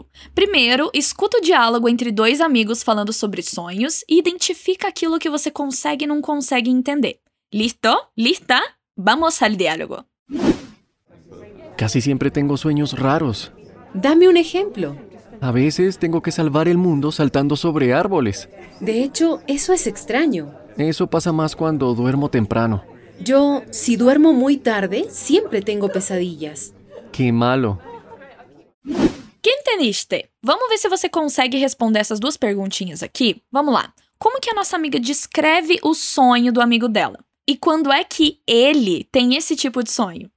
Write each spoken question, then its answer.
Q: Como que a nossa amiga descreve o sonho do amigo dela?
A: Estranho.

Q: E quando é que ele tem esse tipo de sonho?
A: Quando duerme temprano.